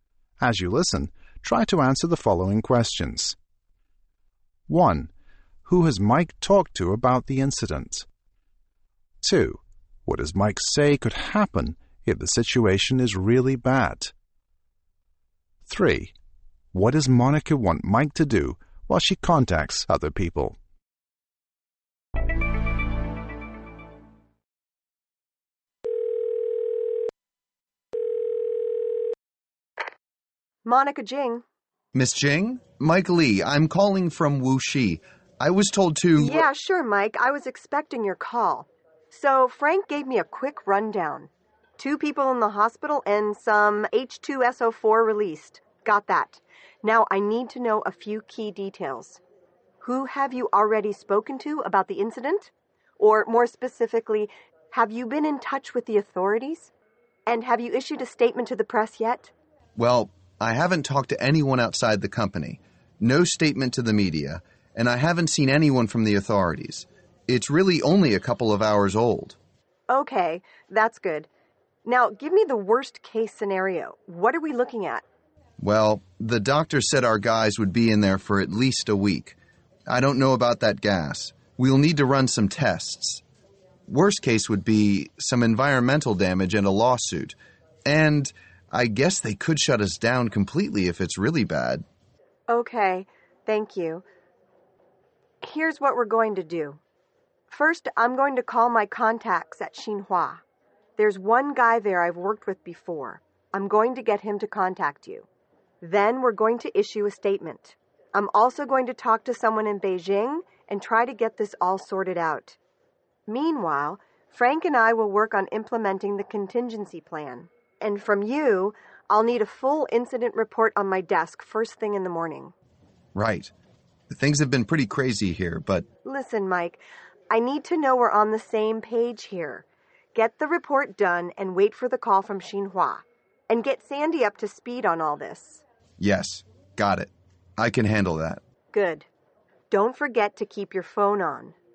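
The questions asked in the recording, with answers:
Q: Who has Mike talked to about the incident?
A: No one outside the company; not the media or the authorities

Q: What does Mike say could happen if the situation is really bad?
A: They could shut the factory down completely (also environmental damage and a lawsuit)

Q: What does Monica want Mike to do while she contacts other people?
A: Write a full incident report, wait for the call from Xinhua, and get Sandy up to speed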